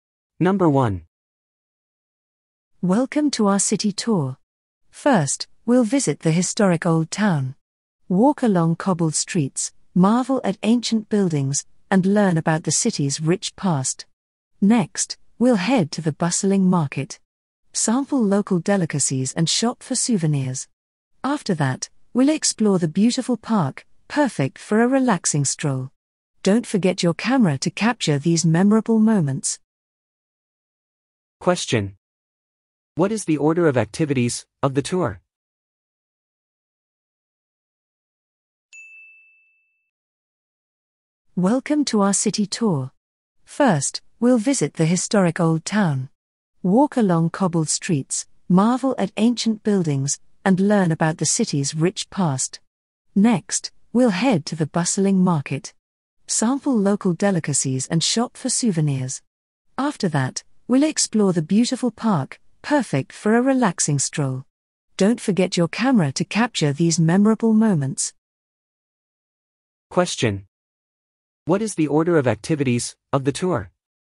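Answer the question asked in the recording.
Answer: Old town, market, park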